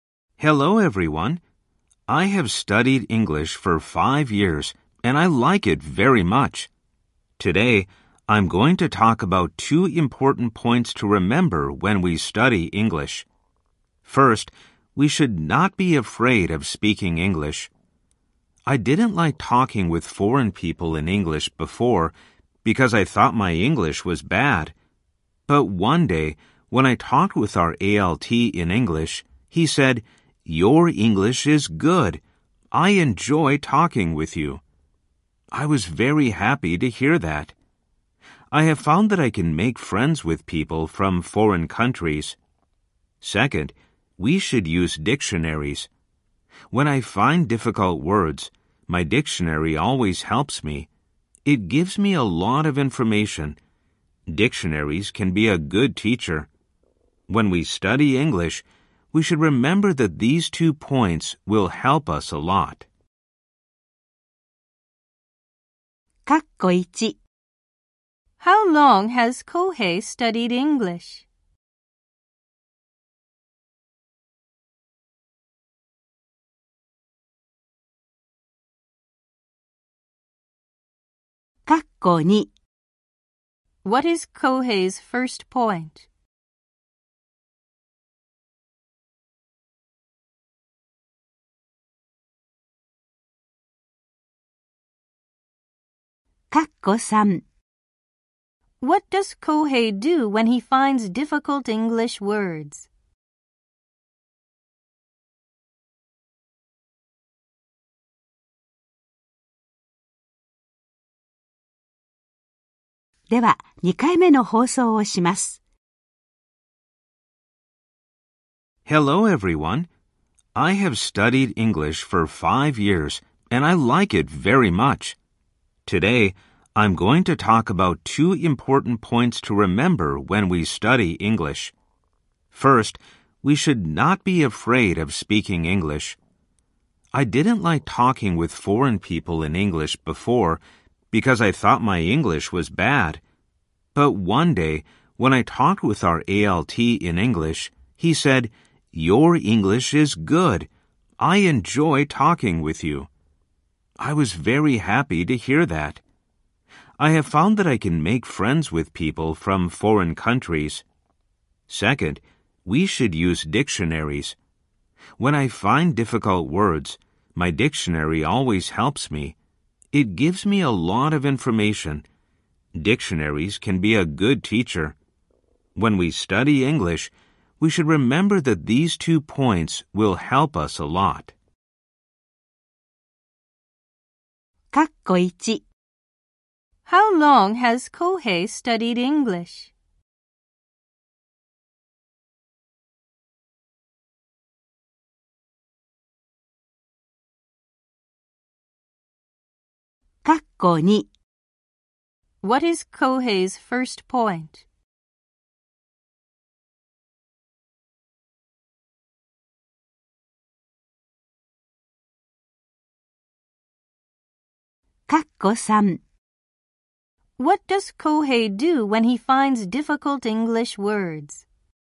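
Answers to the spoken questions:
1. For five years.
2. We should not be afraid of speaking English.
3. He uses his dictionary.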